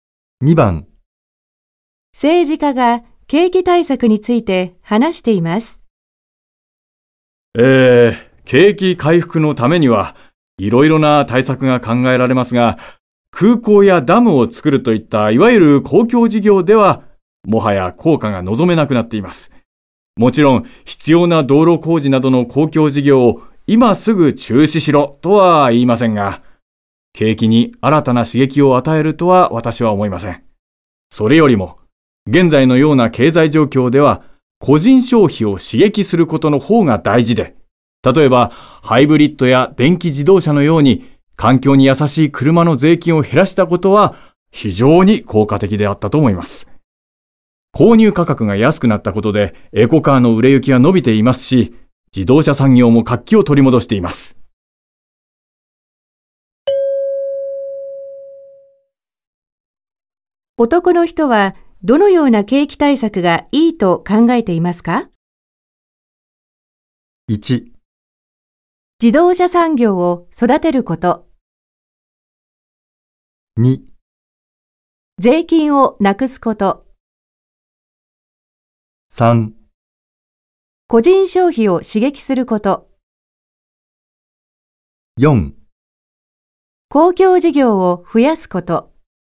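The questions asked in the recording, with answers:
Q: 男の人はどのような景気対策がいいと考えていますか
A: 3: 個人消費を刺激すること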